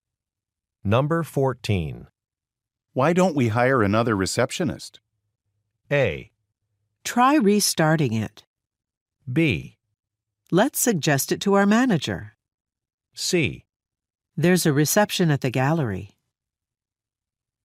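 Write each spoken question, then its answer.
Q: Why don't we hire another receptionist?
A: B: Let's suggest it to our manager.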